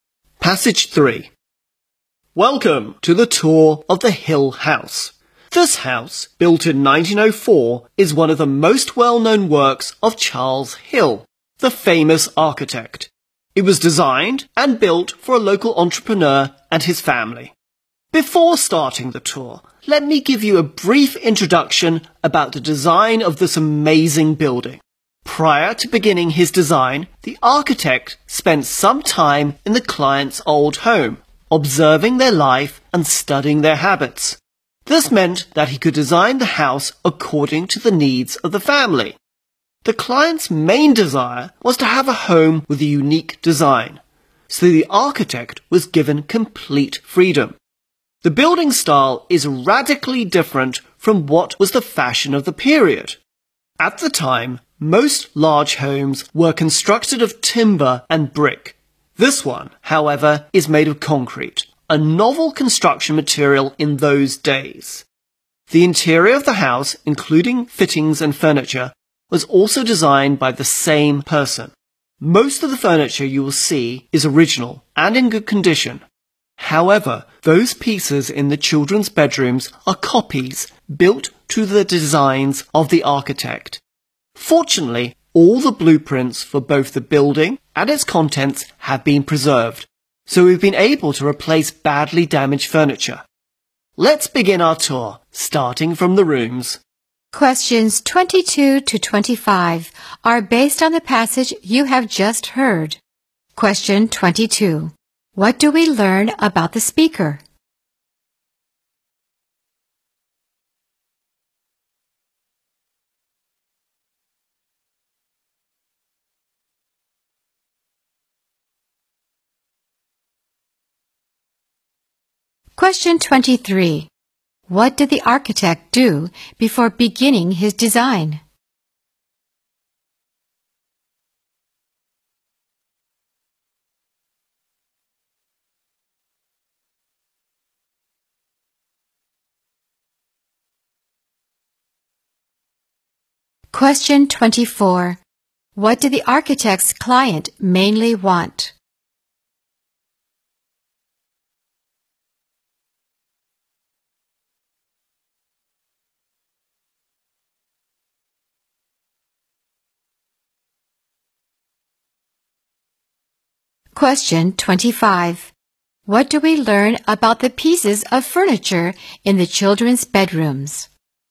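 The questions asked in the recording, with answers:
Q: What do we learn about the speaker?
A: The speaker is a tour guide of the Hill House

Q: What did the architect do before beginning his design?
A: He spent time in the client's old home observing their life and habits

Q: What did the architect's client mainly want?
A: A home with a unique design

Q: What do we learn about the pieces of furniture in the children's bedrooms?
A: They are copies built to the architect's designs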